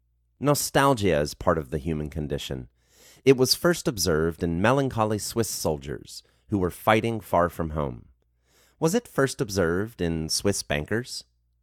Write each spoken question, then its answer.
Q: Was it first observed in Swiss bankers?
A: No, it was not first observed in Swiss bankers.